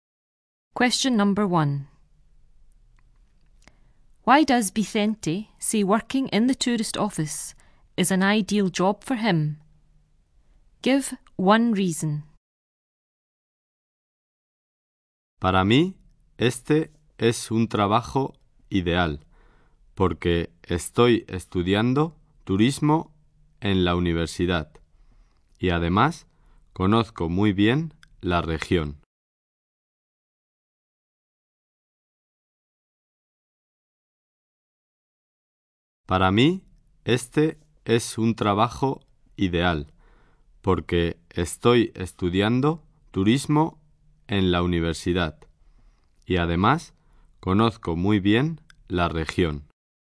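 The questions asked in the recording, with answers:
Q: Why does Vicente say working in the tourist office is an ideal job for him?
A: He is studying tourism at university / he knows the region very well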